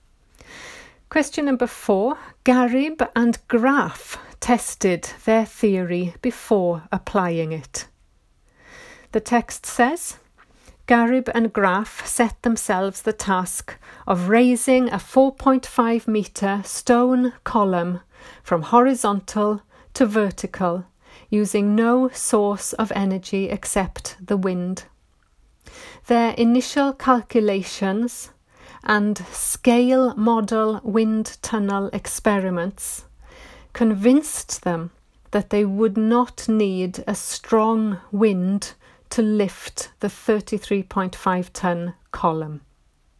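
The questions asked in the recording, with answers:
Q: Garib and Graf tested their theory before applying it.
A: True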